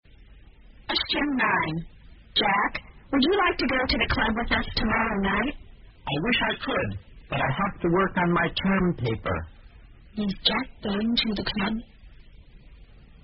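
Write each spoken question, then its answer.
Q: Is Jack going to the club?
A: No, he has to work on his term paper.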